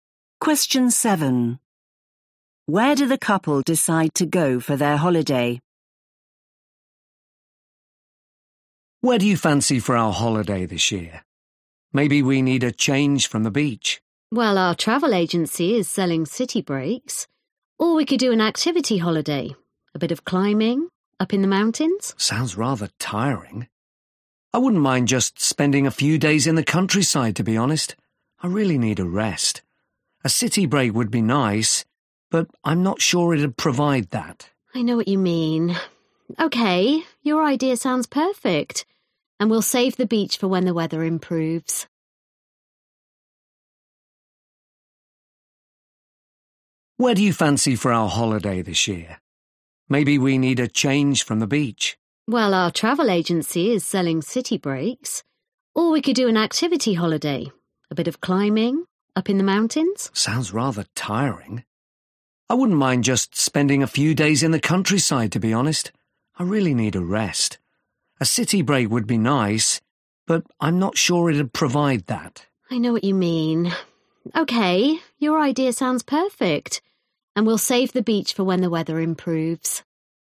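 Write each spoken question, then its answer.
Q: Where do the couple decide to go for their holiday?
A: the countryside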